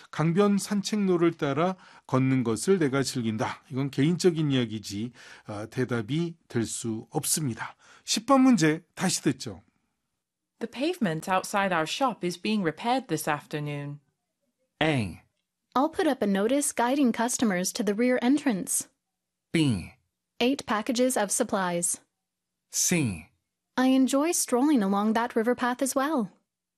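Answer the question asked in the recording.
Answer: A: I'll put up a notice guiding customers to the rear entrance.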